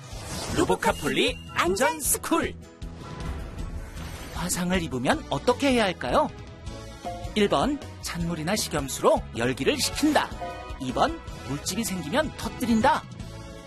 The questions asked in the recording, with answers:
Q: 화상을 입으면 어떻게 해야 할까요?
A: 정답은 1번. 찬물이나 식염수로 열기를 식히고 깨끗한 거즈로 상처 부위를 감싸줘요.